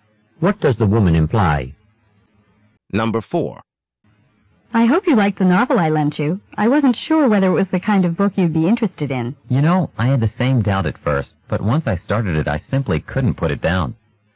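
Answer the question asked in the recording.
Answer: He really enjoyed the novel.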